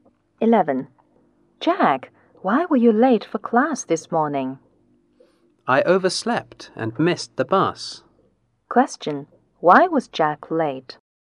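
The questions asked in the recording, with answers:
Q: Why was Jack late?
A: He overslept and missed the bus.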